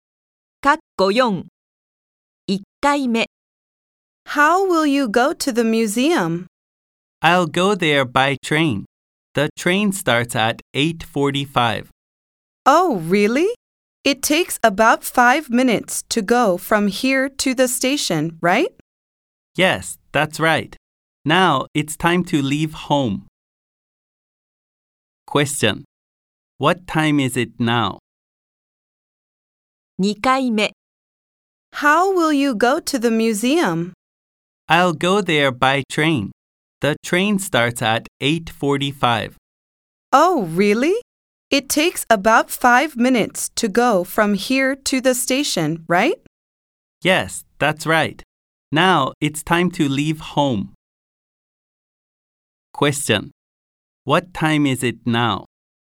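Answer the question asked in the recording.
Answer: 8:40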